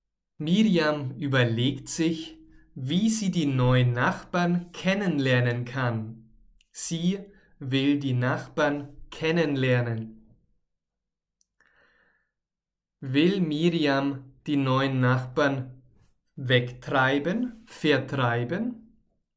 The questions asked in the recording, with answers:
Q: Will Miriam die neuen Nachbarn wegtreiben, vertreiben?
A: Nein, das will sie nicht tun.